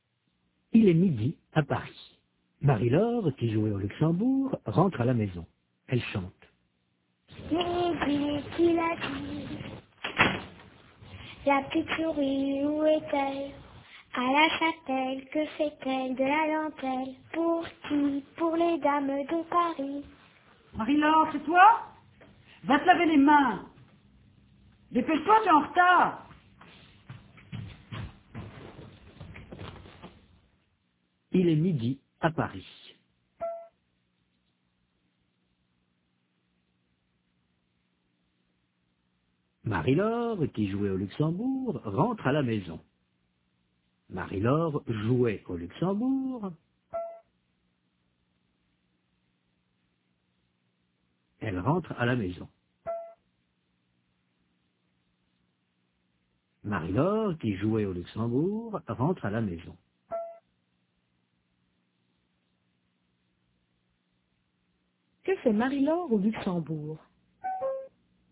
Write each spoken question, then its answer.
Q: Que fait Marie-Laure au Luxembourg?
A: Elle joue.